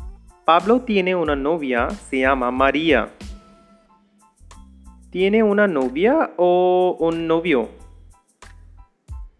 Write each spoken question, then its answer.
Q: ¿Tiene una novia o un novio?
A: Sí. Pablo tiene una novia, no un novio.